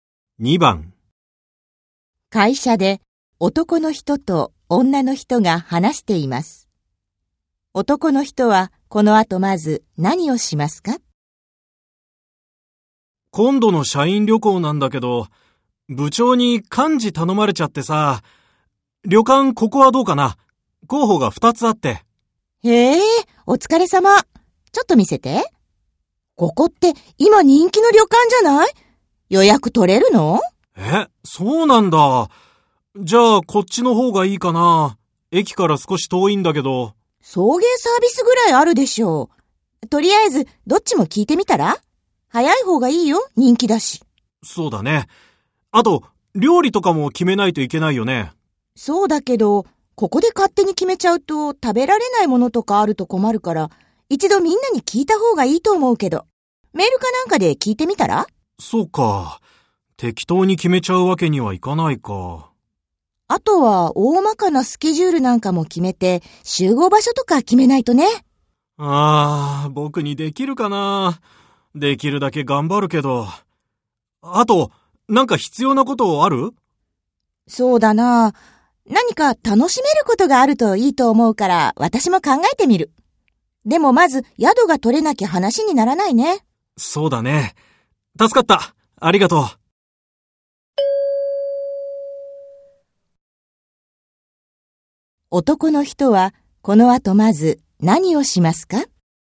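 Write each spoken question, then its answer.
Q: 男の人はこの後まず何をしますか?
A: 旅館に予約が取れるか問い合わせる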